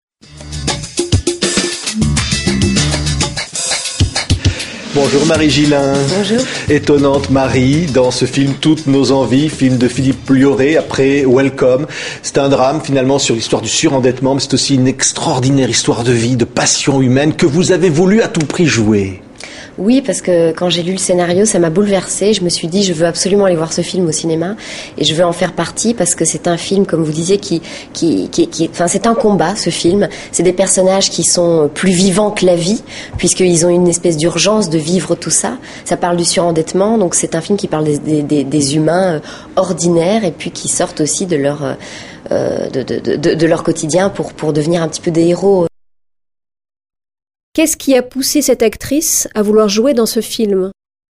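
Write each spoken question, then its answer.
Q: Qu'est-ce qui a poussé cette actrice à vouloir jouer dans ce film ?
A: Le scénario l'a bouleversée quand elle l'a lu.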